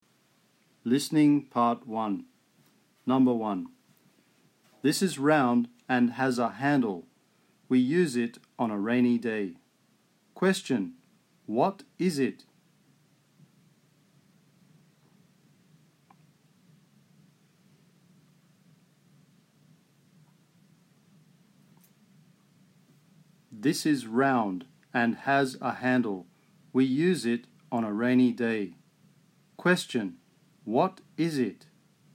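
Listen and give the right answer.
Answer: an umbrella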